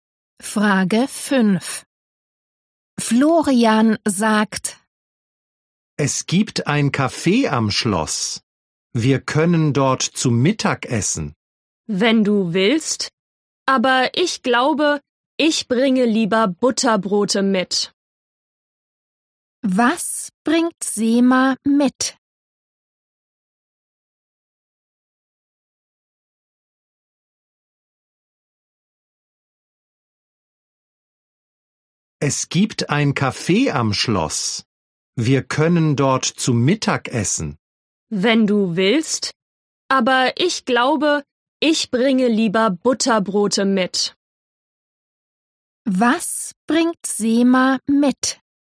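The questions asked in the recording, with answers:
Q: Was bringt Sema mit?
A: Butterbrote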